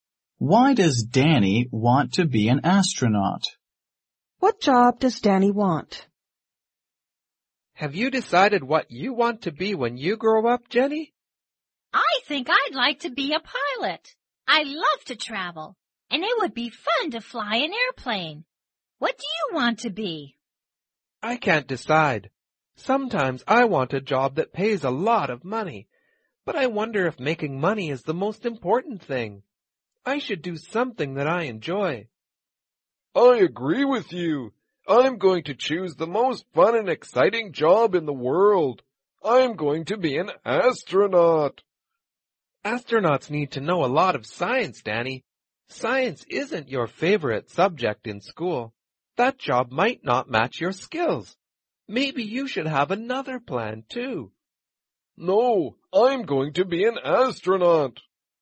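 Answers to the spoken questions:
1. He thinks it is the most fun and exciting job in the world.
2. Astronaut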